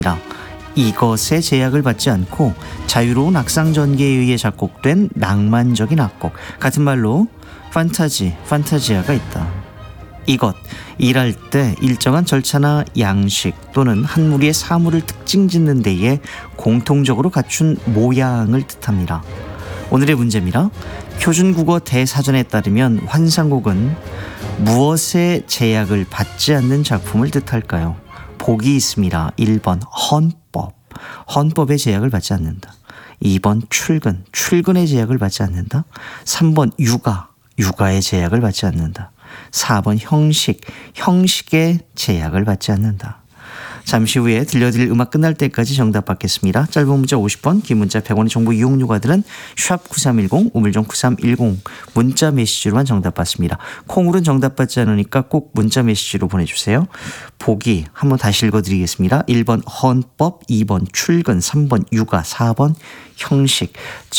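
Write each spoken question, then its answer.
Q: 표준국어 대사전에 따르면 환상곡은 무엇에 제약을 받지 않는 작품을 뜻할까요?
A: 4: 형식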